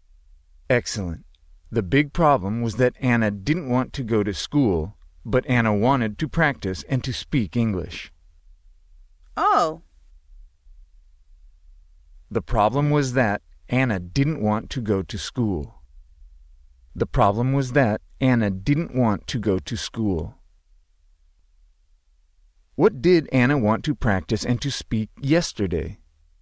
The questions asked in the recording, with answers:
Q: What did Anna want to practice and to speak yesterday?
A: English.